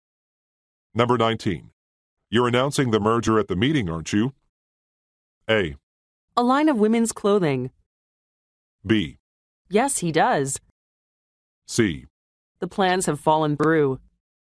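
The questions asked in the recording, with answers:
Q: You're announcing the merger at the meeting, aren't you?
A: C: The plans have fallen through.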